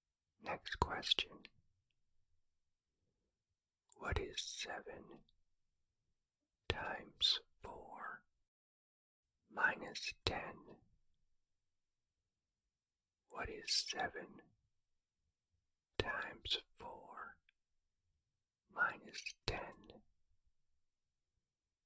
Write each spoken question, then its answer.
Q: What is 7 times 4 minus 10?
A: The answer is 18.